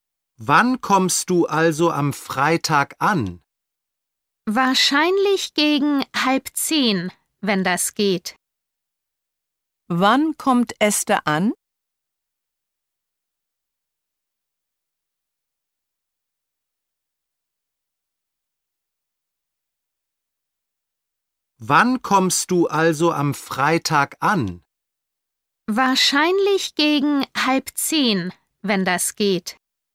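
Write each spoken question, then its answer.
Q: Wann kommt Esther an?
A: Am Freitag gegen 9:30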